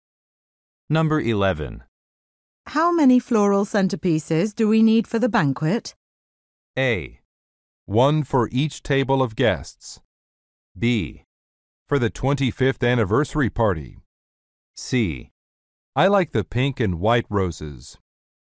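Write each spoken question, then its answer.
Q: How many floral centerpieces do we need for the banquet?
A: A: 1 for each table of guests.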